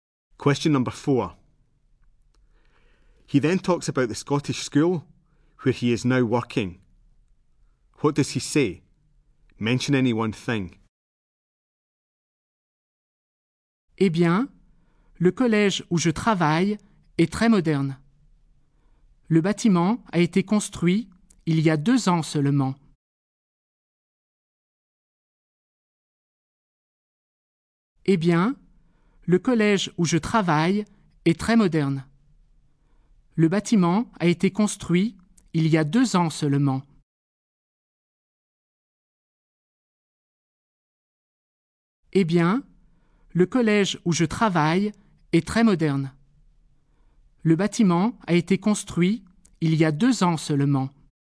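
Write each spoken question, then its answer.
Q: What does he say? Mention any one thing.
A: The school is very modern; the building was built only 2 years ago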